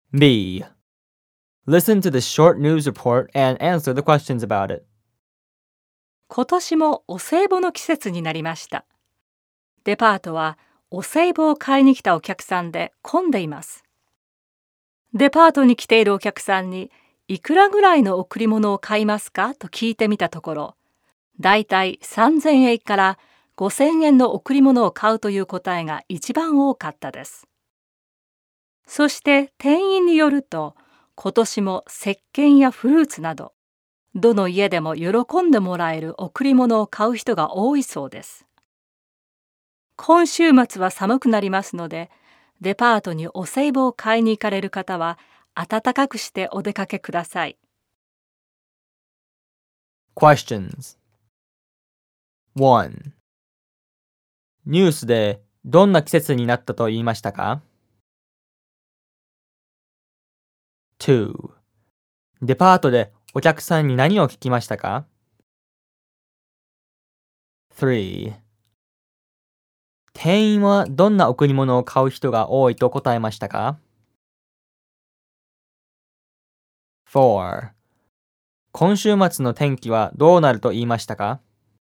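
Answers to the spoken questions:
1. お歳暮の季節
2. いくらぐらいの贈り物を買うか
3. 石鹸やフルーツなど、どの家でも喜んでもらえる贈り物
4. 寒くなる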